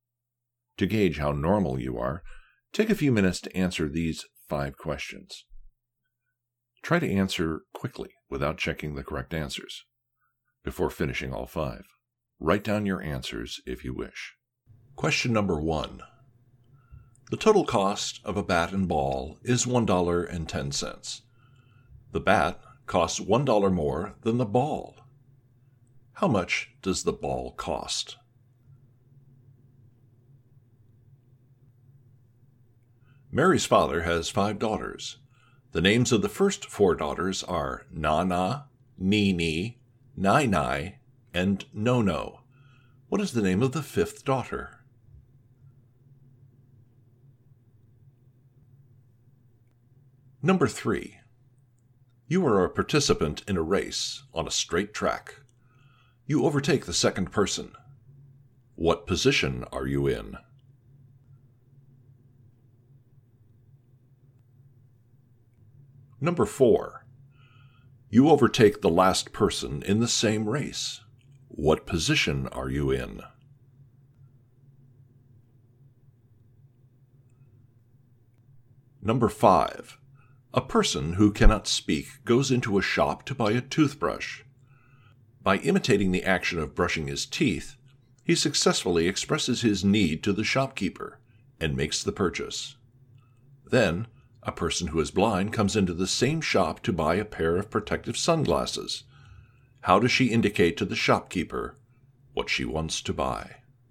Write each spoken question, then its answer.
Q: How much does the ball cost?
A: The answer is 5 cents.

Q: What is the name of the 5th daughter?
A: Answer. Most say Nunu, but the correct answer is Mary.

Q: What position are you in?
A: There can be no answer to the question because it's impossible to be behind the last person because there is no one behind the last person in a race.

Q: How does she indicate to the shopkeeper what she wants to buy?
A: The answer is, she asks.